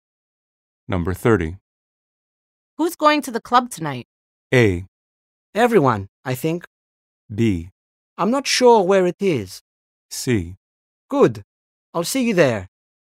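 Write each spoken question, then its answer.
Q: Who's going to the club tonight?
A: A: Everyone, I think.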